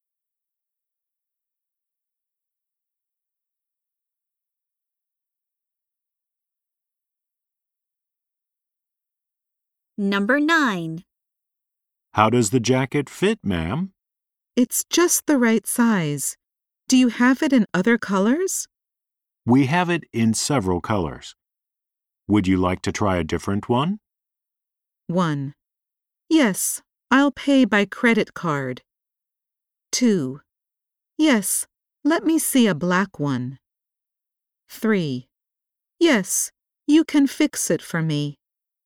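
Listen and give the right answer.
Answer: 2: Yes, let me see a black one.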